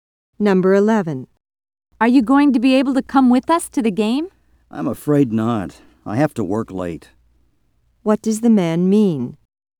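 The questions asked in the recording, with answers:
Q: What does the man mean?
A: He can't go to the game because he has to work late.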